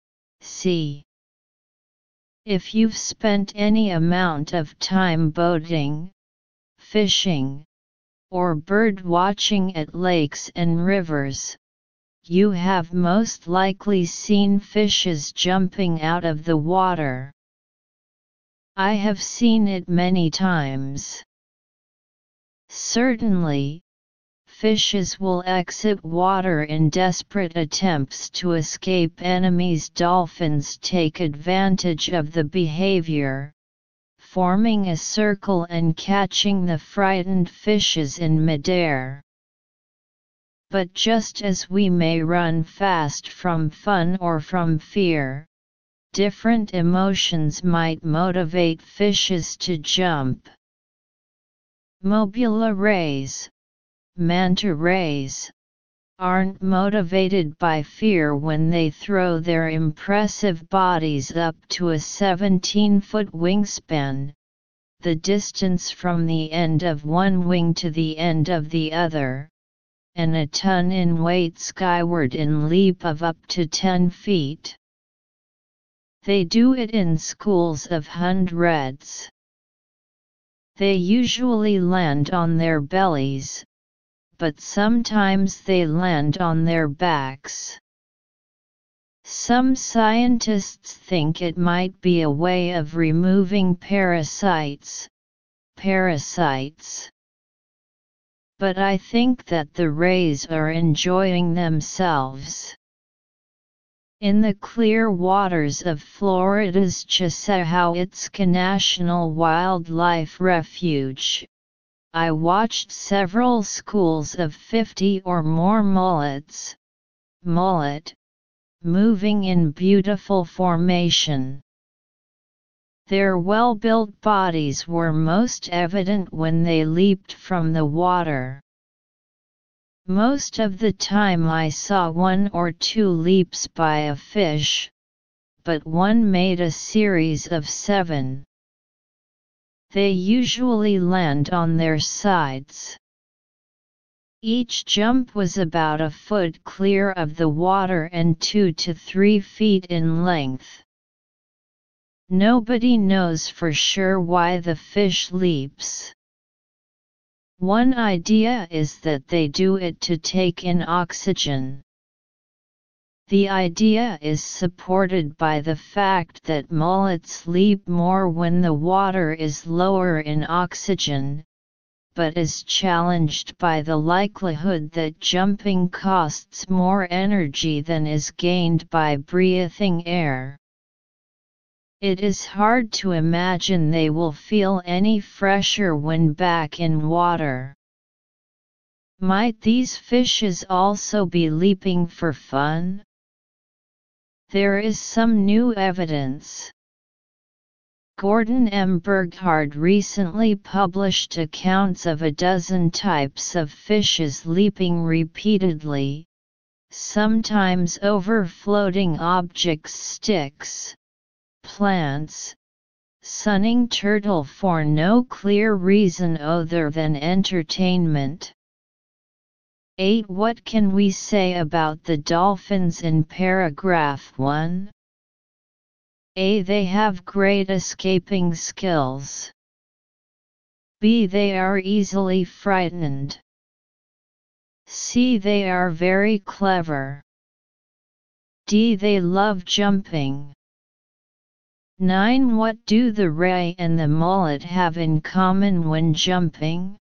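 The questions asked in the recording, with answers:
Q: What can we say about the dolphins in paragraph 1?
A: C: They are very clever.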